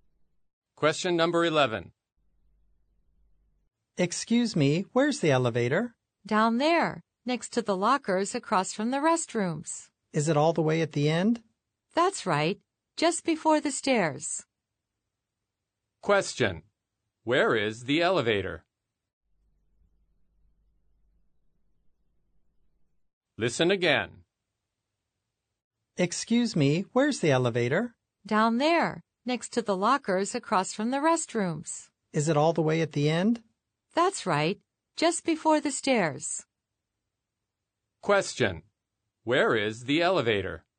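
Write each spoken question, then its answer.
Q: Where is the elevator?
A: At the end, next to the lockers, across from the restrooms, just before the stairs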